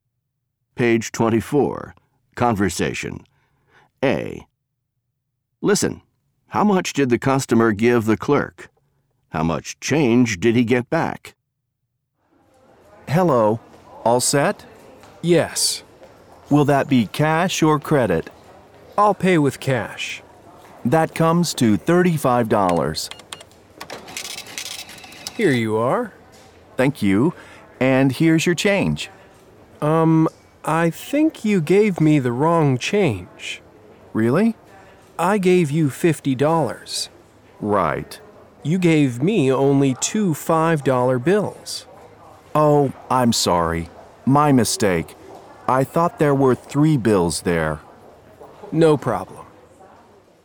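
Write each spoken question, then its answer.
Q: how much did the customer give the clerk?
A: $50

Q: How much change did he get back?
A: $10 (two $5 bills), but it should have been $15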